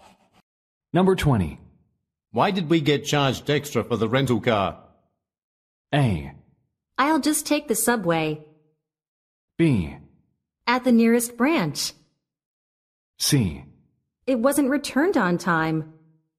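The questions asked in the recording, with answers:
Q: Why did we get charged extra for the rental car?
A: C: It wasn't returned on time.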